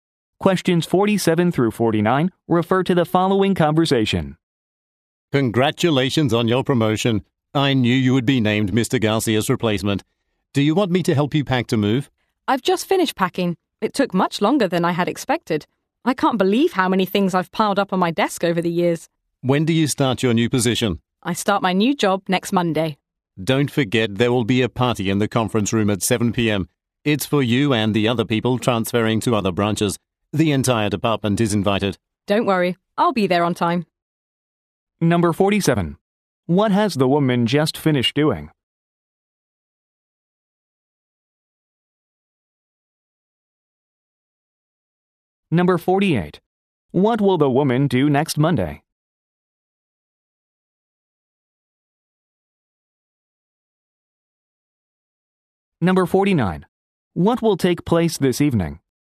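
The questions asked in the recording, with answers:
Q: What has the woman just finished doing?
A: Packing

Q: What will the woman do next Monday?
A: Start her new position

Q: What will take place this evening?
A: A party for transferring employees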